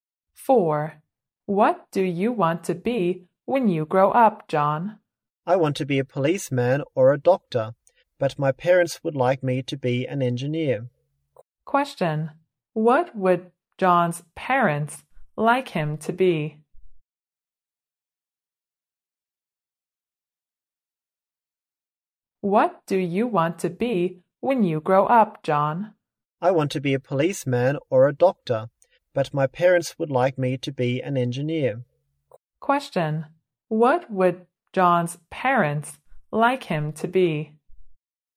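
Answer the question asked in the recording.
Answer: An engineer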